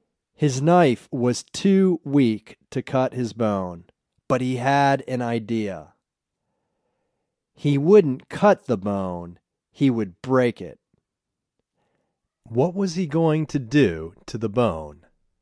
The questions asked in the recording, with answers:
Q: What was he going to do to the bone?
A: He was going to break the bone.